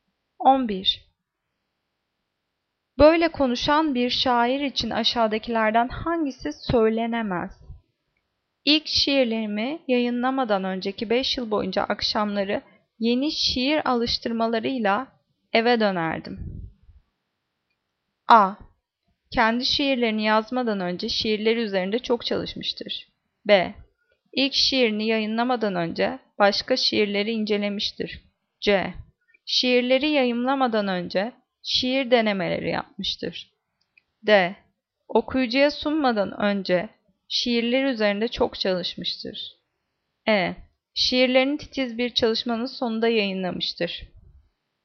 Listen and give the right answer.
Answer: Cevap B. İlk şiirini yayınlamadan önce başka şiirlerini incelemiştir.